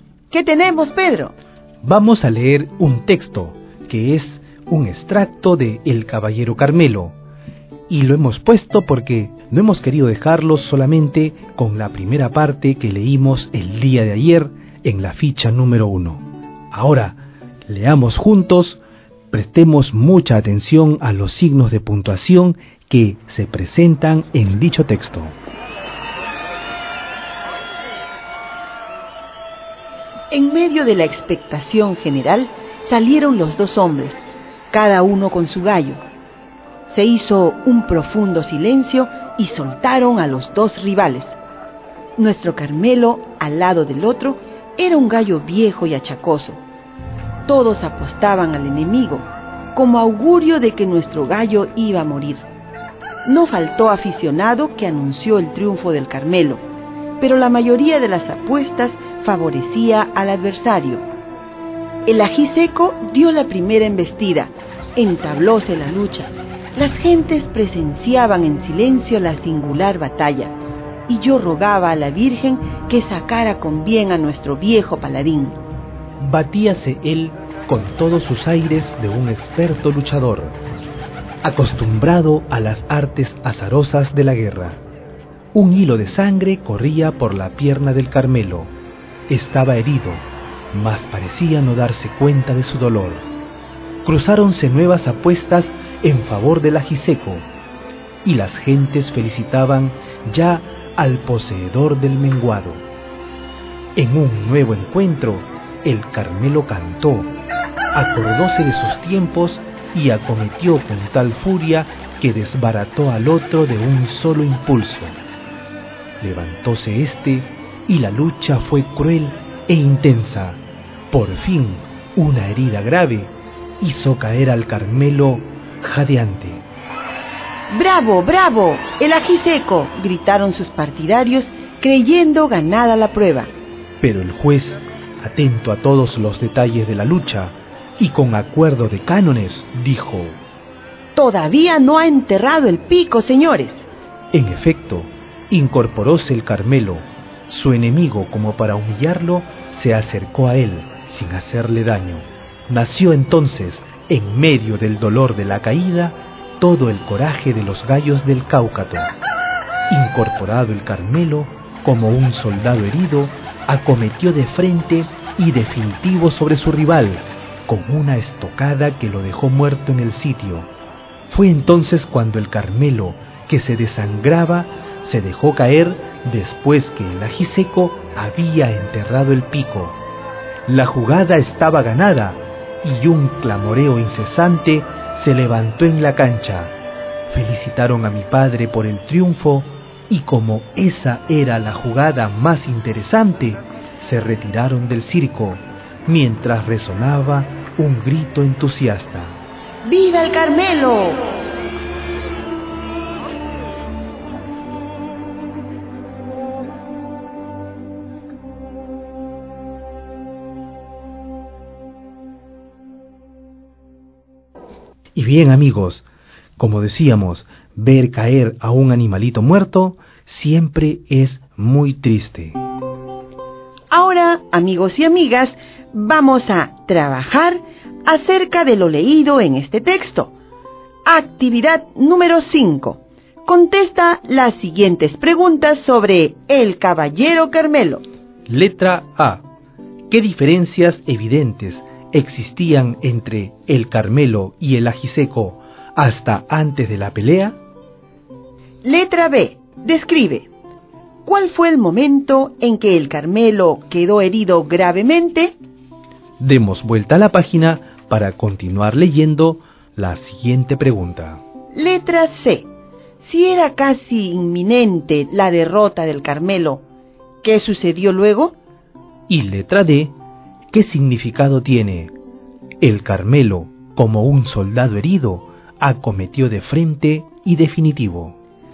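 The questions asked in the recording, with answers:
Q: ¿Qué diferencias evidentes existían entre el Carmelo y el ají seco hasta antes de la pelea?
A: El Carmelo era un gallo viejo y achacoso, y la mayoría apostaba por el ají seco

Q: Describe. ¿Cuál fue el momento en que el Carmelo quedó herido gravemente?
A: Cuando, tras una lucha cruel e intensa, una herida grave lo hizo caer jadeante

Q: Si era casi inminente la derrota del Carmelo, ¿qué sucedió luego?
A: Se incorporó y mató al ají seco de una estocada; luego se dejó caer desangrándose y ganó la pelea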